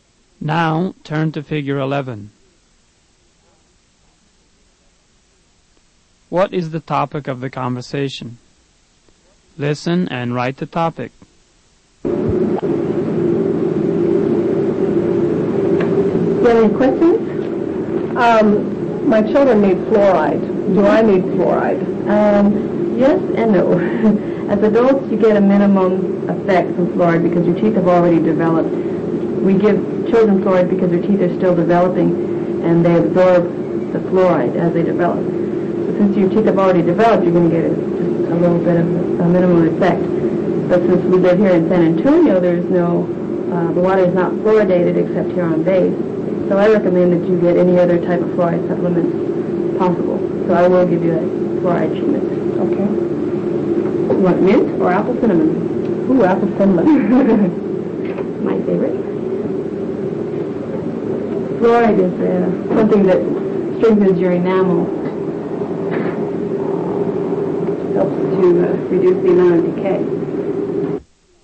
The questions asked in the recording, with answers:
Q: What is the topic?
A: The topic is fluoride treatment to prevent tooth decay.